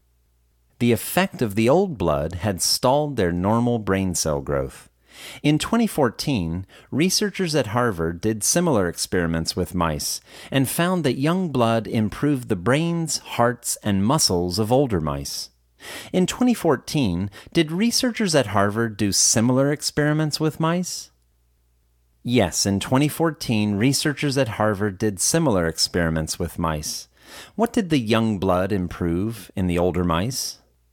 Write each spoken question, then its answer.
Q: What did the young blood improve in the older mice?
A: The young blood improved the brains, hearts, and muscles of older mice.